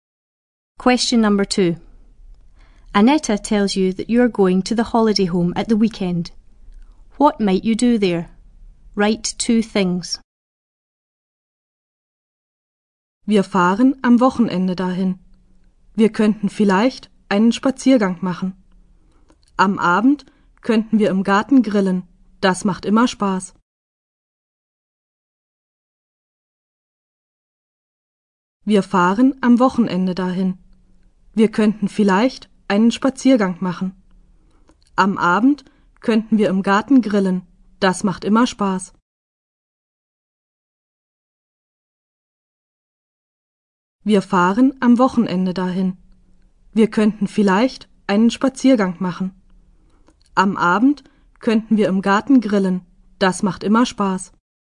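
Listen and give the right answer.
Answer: Go for a walk; have a barbecue in the garden in the evening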